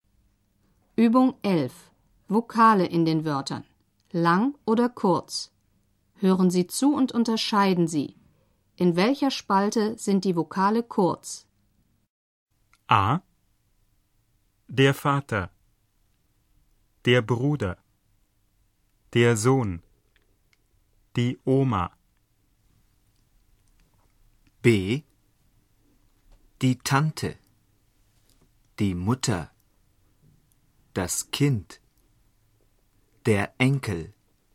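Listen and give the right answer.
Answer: B: Die Tante. Die Mutter. Das Kind. Der Enkel.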